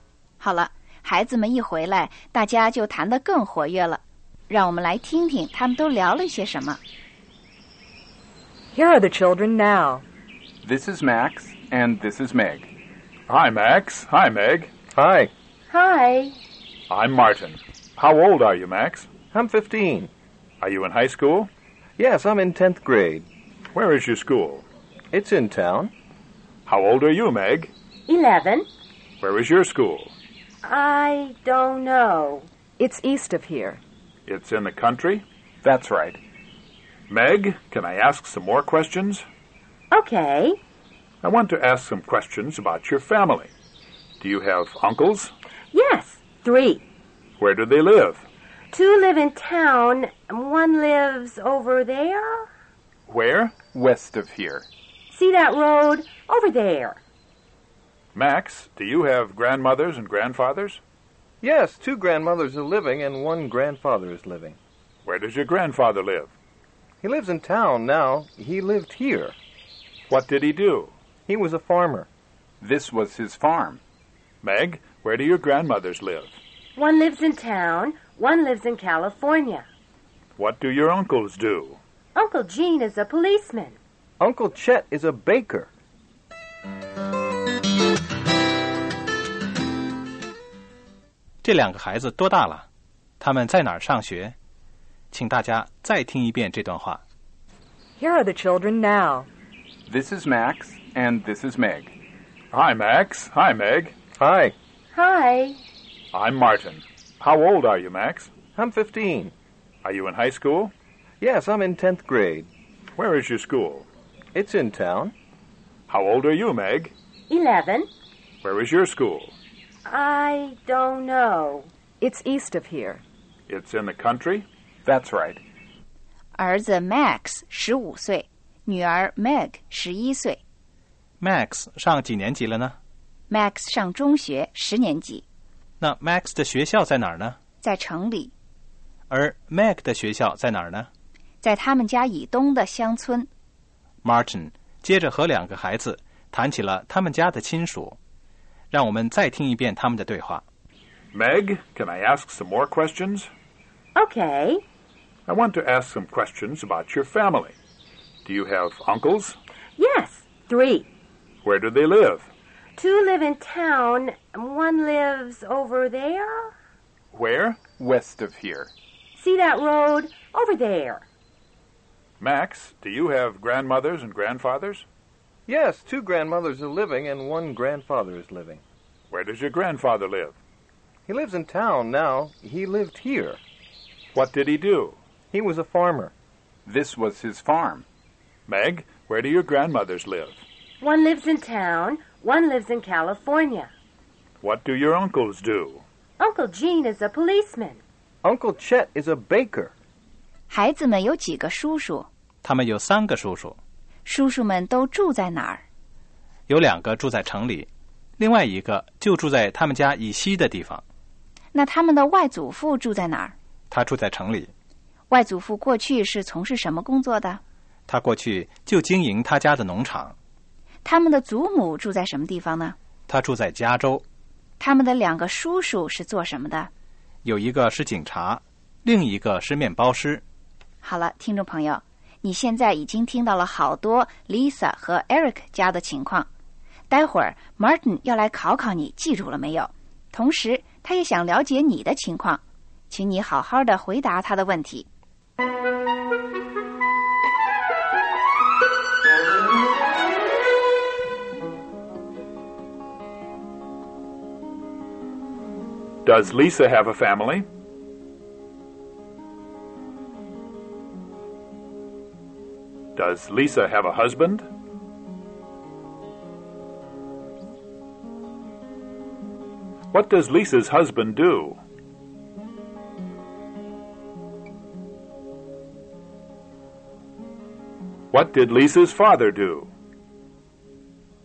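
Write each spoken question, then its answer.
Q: Does Lisa have a family?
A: Yes, she does.

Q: Does Lisa have a husband?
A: Yes, she does. His name is Eric.

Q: What did Lisa's father do?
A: He was a farmer.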